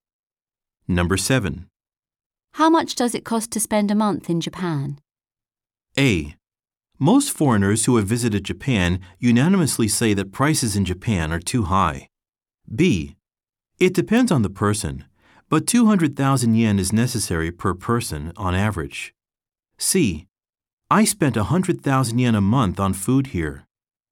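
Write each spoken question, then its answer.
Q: How much does it cost to spend a month in Japan?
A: B: It depends on the person, but 200,000 yen is necessary per person on average.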